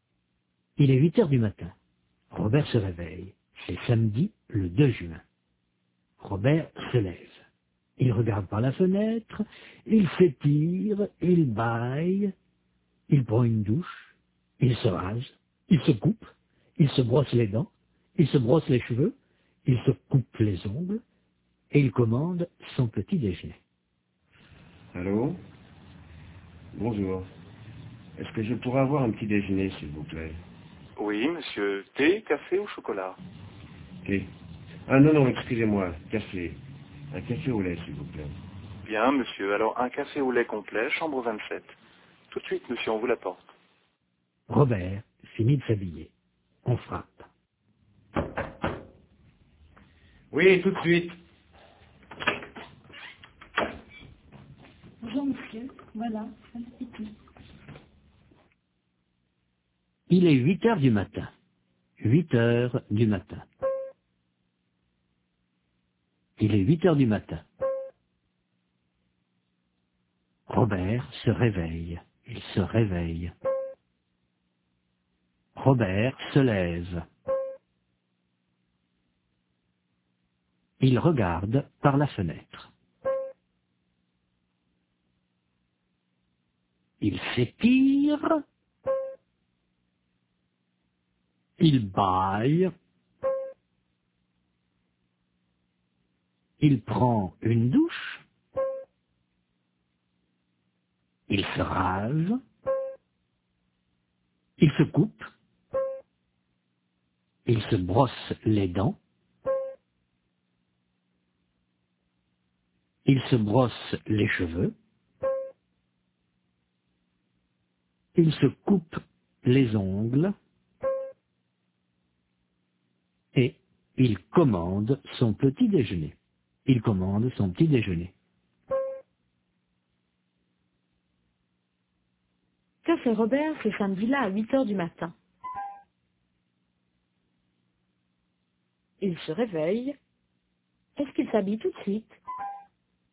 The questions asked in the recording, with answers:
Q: Est-ce qu'il s'habille tout de suite?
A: Non, il regarde par la fenêtre, il s'étire, il baille, il prend une douche, il se rase, il se brosse les dents, il se brosse les cheveux, il se coupe les ongles.